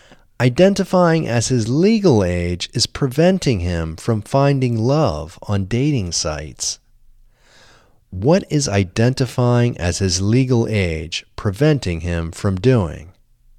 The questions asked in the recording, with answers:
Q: What is identifying as his legal age preventing him from doing?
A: Identifying as his legal age is preventing him from finding love on dating sites.